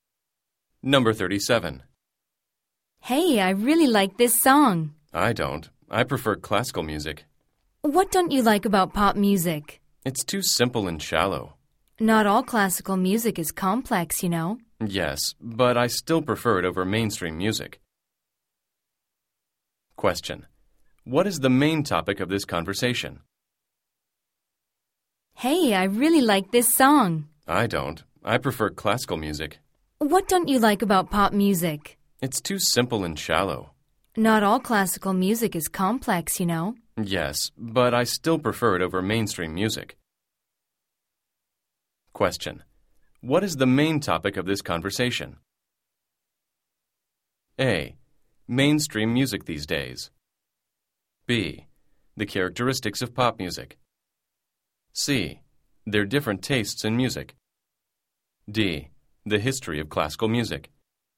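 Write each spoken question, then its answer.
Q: What is the main topic of this conversation?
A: C: Their different tastes in music.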